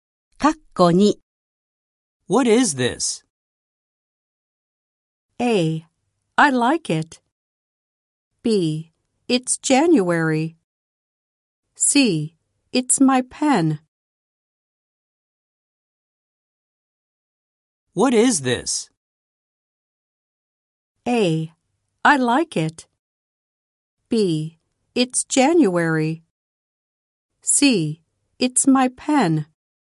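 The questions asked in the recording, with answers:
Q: What is this?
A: C: It's my pen.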